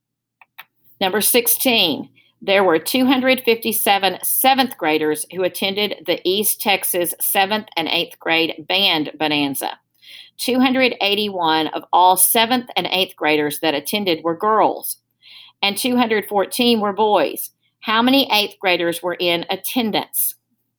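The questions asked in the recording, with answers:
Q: How many eighth graders were in attendance?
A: 238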